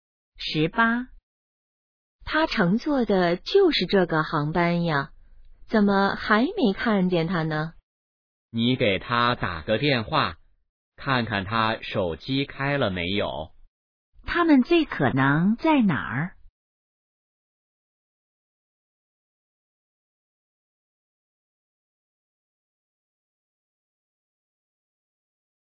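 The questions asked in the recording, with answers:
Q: 他们最可能在哪儿?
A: 机场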